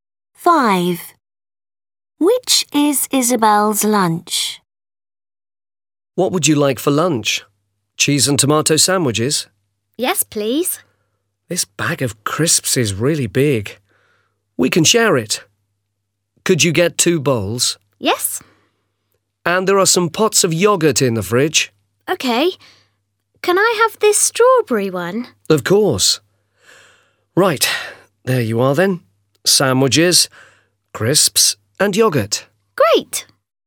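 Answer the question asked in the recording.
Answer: cheese and tomato sandwiches, crisps and strawberry yoghurt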